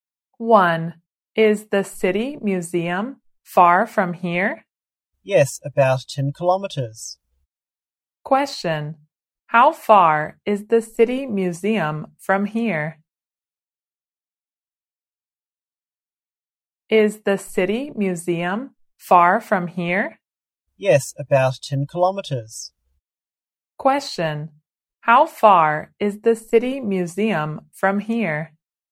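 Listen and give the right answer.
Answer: About 10 kilometers.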